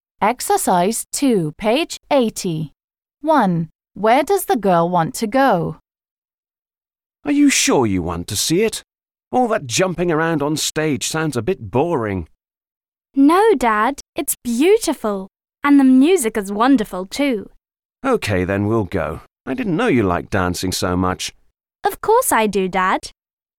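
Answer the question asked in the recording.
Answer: To the ballet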